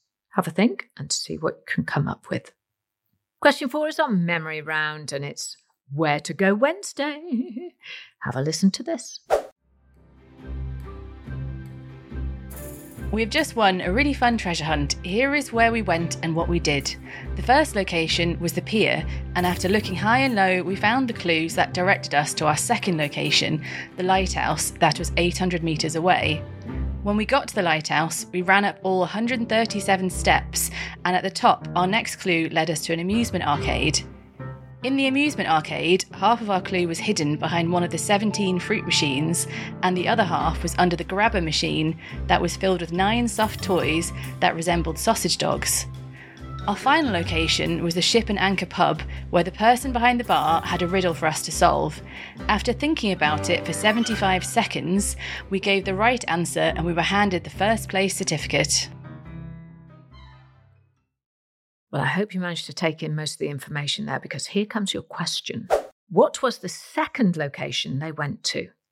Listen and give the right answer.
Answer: And the answer I was looking for was the lighthouse.